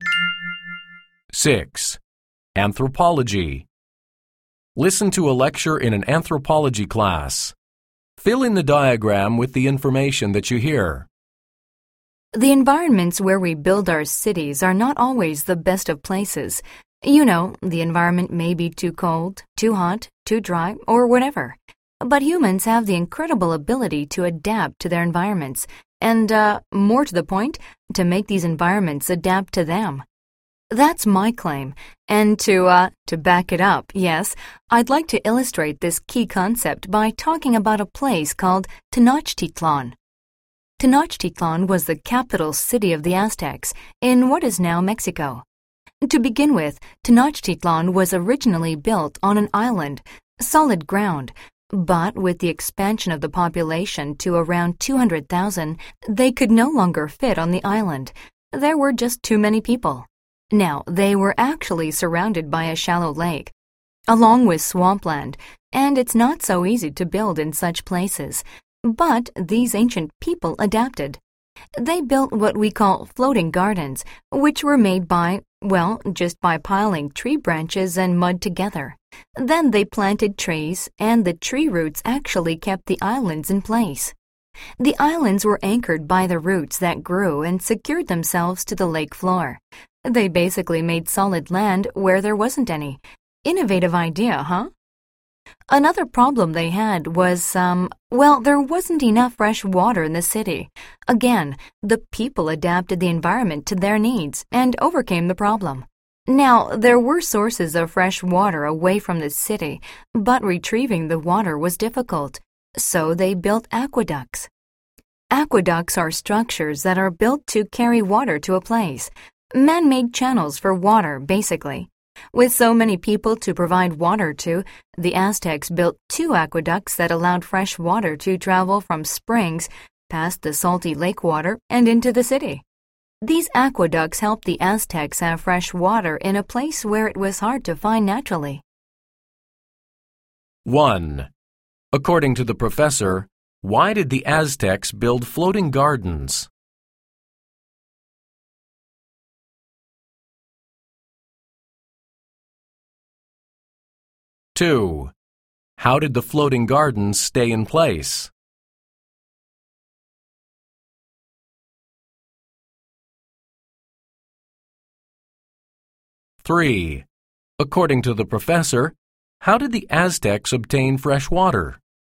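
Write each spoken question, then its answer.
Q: According to the professor, why did the Aztecs build floating gardens?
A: The population grew too large to fit on the island, so they needed more land

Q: How did the floating gardens stay in place?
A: Tree roots anchored them to the lake floor

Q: According to the professor, how did the Aztecs obtain fresh water?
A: They built aqueducts carrying water from springs into the city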